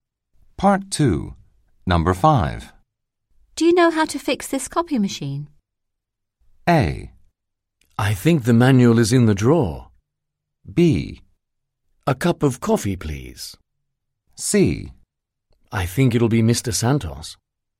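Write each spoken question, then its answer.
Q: Do you know how to fix this copy machine?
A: A: I think the manual is in the drawer.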